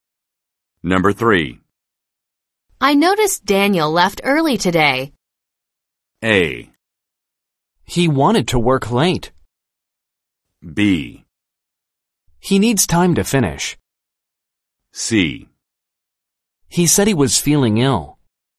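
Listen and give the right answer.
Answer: C: He said he was feeling ill.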